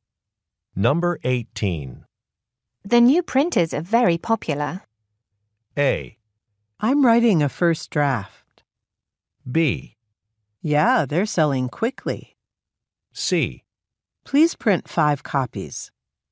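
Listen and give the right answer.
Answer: B: Yeah, they're selling quickly.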